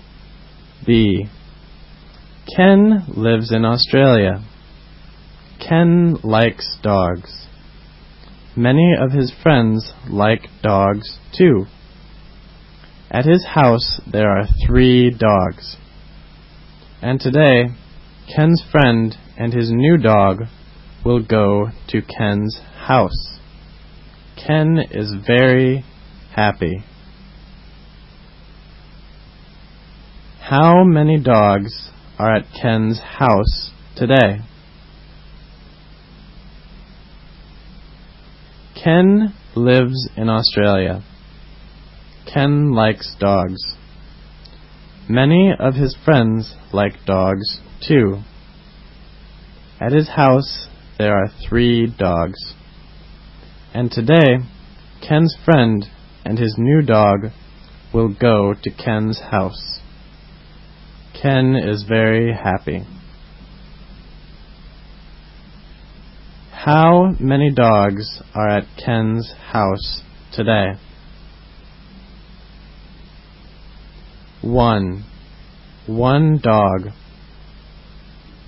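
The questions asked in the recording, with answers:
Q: How many dogs are at Ken's house today?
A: 3: 4 dogs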